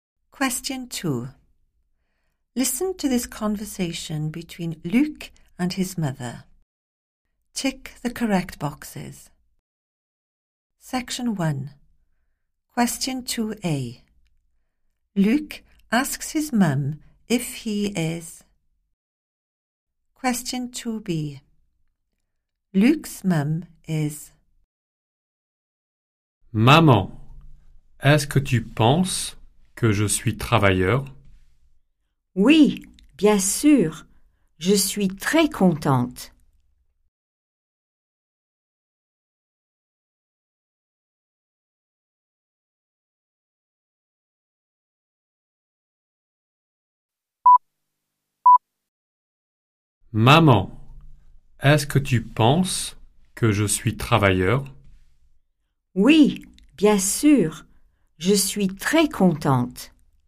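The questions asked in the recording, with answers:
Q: Luc asks his mum if he is...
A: hard-working

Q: Luc's mum is...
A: very happy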